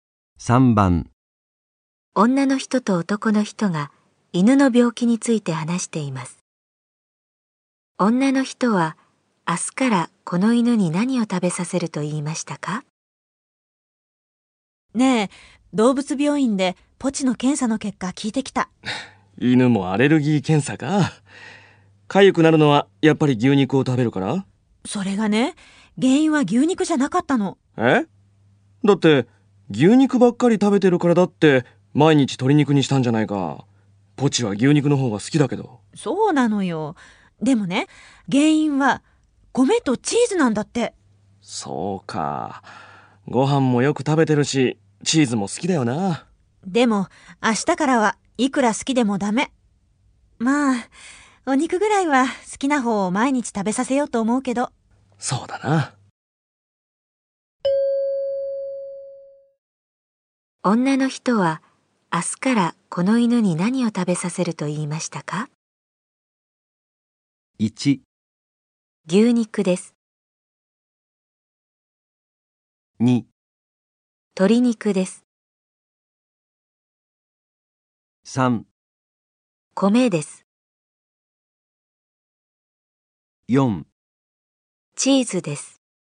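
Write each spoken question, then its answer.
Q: からこの犬に何を食べさせると言いましたか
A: 1: 牛肉です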